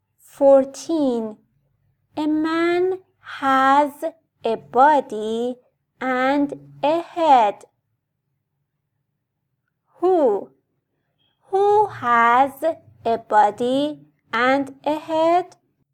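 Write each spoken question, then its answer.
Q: Who has a body and a head?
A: a man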